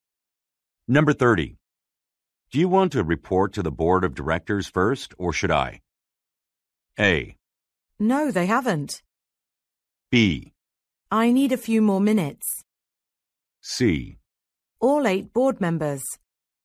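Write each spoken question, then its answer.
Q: Do you want to report to the board of directors first, or should I?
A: B: I need a few more minutes.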